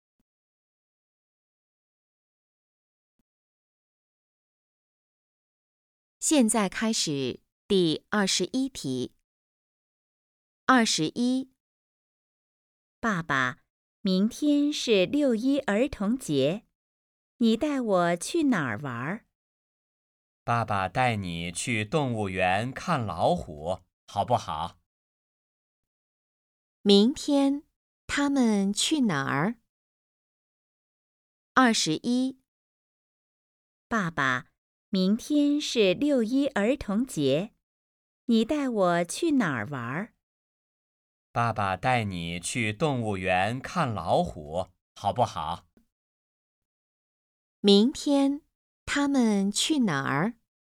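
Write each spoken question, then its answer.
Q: 明天他们去哪儿?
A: 动物园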